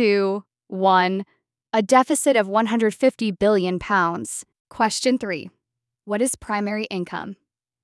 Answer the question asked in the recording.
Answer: Investment income, including dividends, interest, and profits from foreign direct investment.